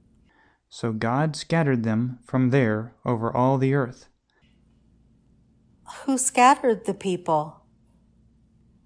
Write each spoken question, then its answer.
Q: Who scattered the people?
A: God scattered the people.